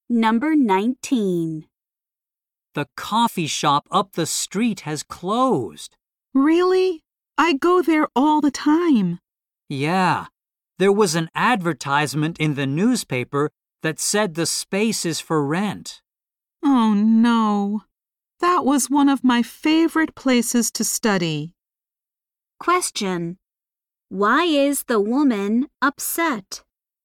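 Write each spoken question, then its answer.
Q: Why is the woman upset?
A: Her favorite place to study, the coffee shop, has closed.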